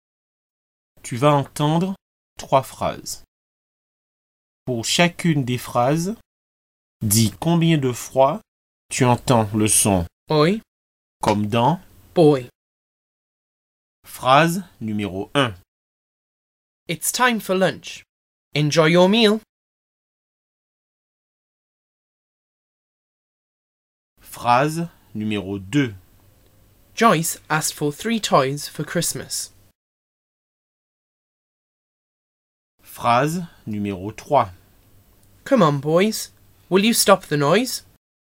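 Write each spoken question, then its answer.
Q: Pour chacune des phrases, dis combien de fois tu entends le son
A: 1 fois (enjoy)

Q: Pour chacune des phrases, dis combien de fois tu entends le son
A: 2 fois (Joyce, toys)

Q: Pour chacune des phrases, dis combien de fois tu entends le son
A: 2 fois (boys, noise)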